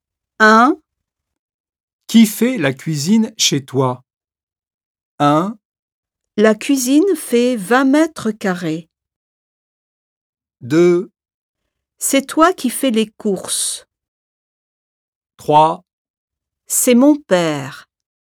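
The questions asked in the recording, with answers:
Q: Qui fait la cuisine chez toi?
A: 3: C'est mon père.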